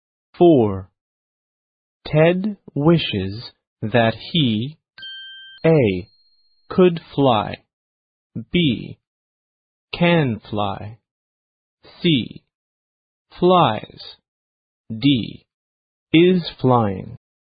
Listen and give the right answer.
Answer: 恭喜选 A 的同学,你答对咯。